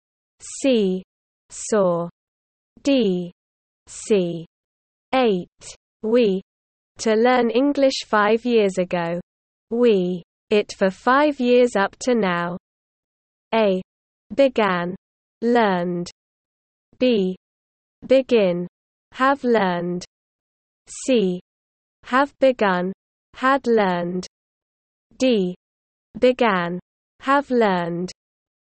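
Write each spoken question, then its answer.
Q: We. To learn English 5 years ago. We. It for 5 years up to now.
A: D: Began, have learned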